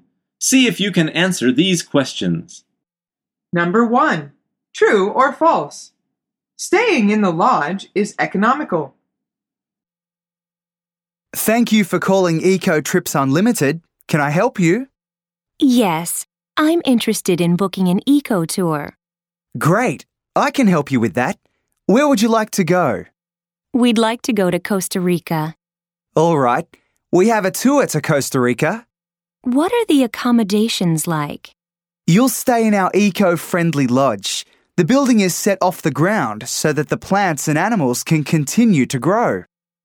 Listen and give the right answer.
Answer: The answer is false. The agent says the lodge is eco-friendly.